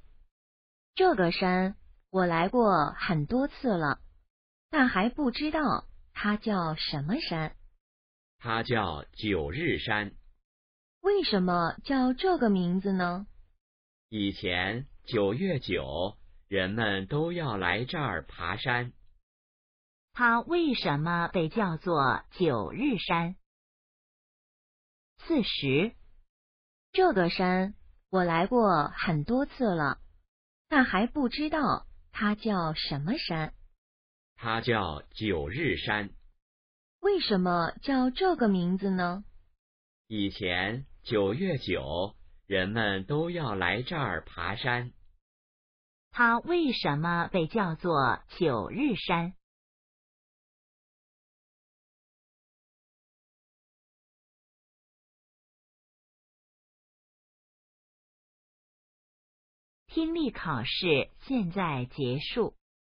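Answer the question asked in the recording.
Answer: 以前人们在九月九日都来这儿爬山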